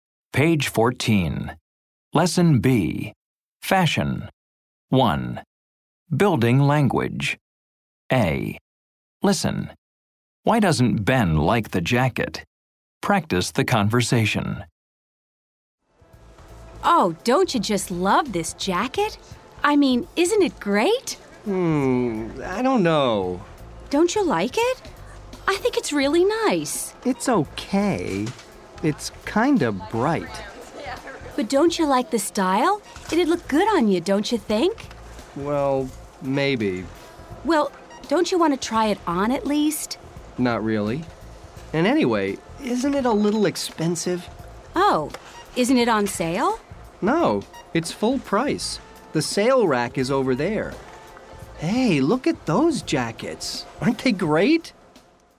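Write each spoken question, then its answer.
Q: Why doesn't Ben like the jacket?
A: It's kind of bright, and it's a little expensive (full price).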